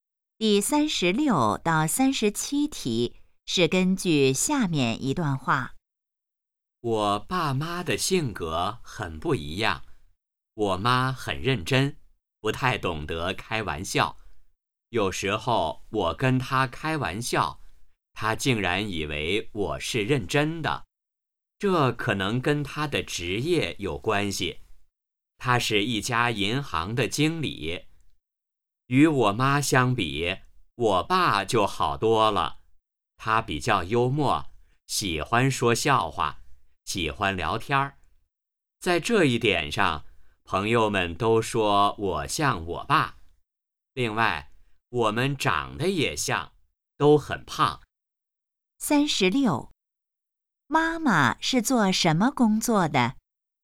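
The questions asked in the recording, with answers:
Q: 妈妈是做什么工作的?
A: 银行经理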